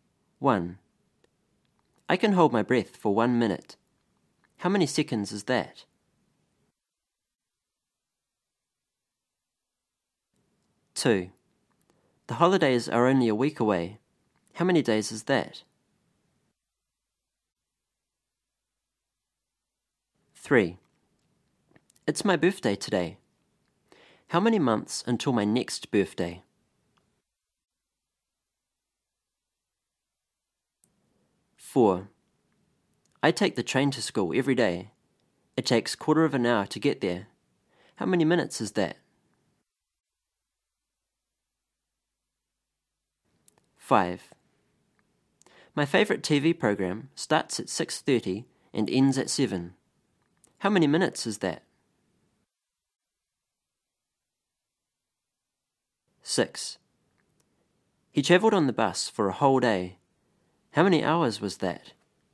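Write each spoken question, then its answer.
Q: How many seconds is that?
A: 60

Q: How many months until my next birthday?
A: 12

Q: How many minutes is that?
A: 15

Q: How many minutes is that?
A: 30

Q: How many hours was that?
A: 24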